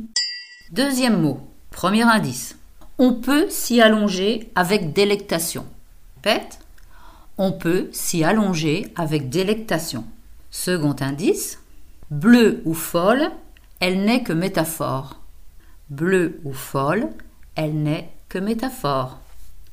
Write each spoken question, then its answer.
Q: On peut s'y allonger avec délectation.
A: C'est l'herbe. L'herbe bleue, l'herbe folle.